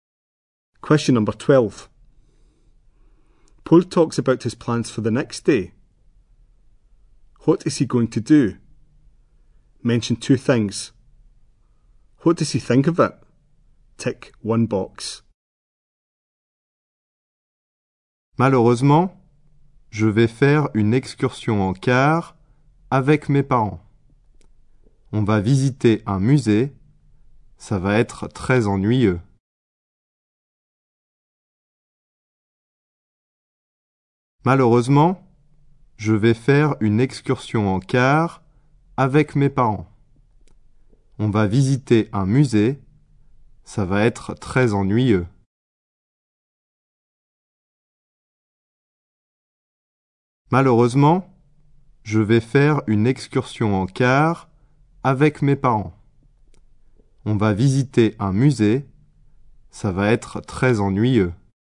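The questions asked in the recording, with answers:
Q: What is he going to do? Mention two things.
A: A coach trip with his parents; visit a museum

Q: What does he think of it?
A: It will be very boring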